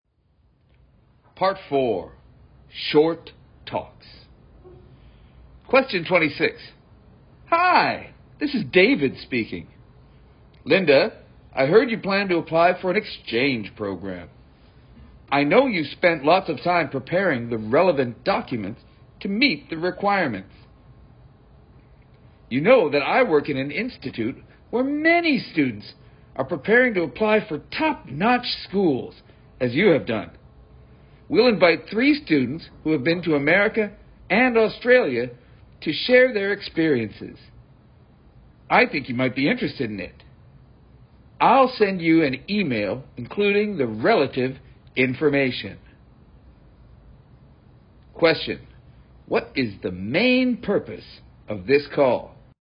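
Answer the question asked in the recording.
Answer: To invite Linda to an event where students share their experiences of studying abroad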